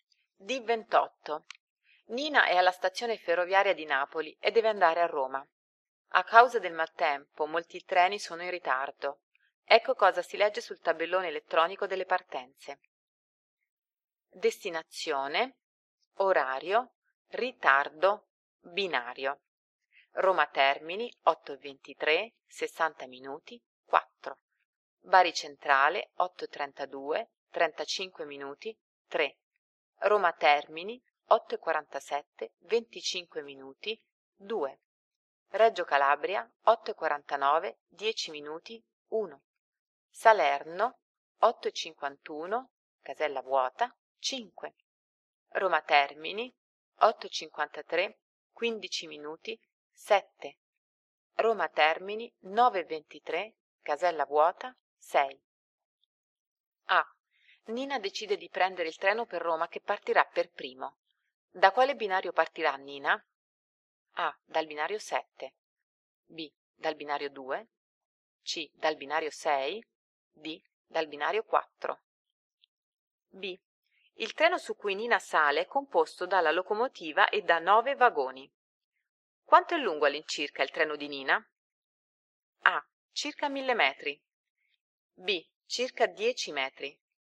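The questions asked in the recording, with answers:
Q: Da quale binario partirà Nina?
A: A: Dal binario 7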